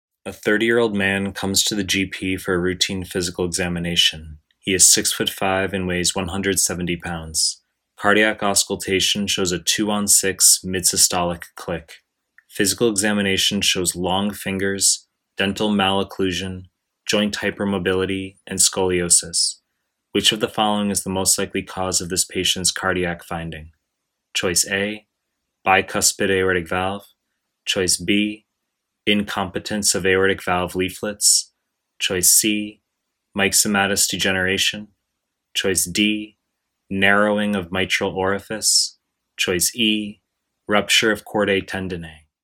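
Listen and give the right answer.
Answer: C: myxomatous degeneration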